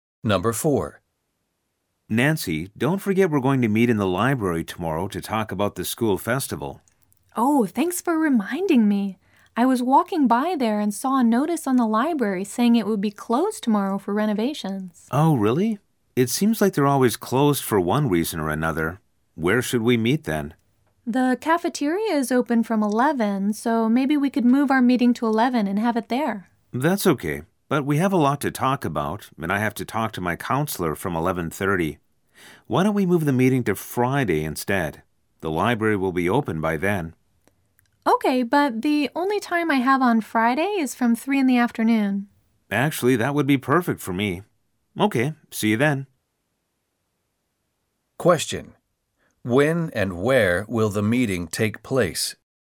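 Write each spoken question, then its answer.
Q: When and where will the meeting take place?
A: On Friday at 3 p.m. in the library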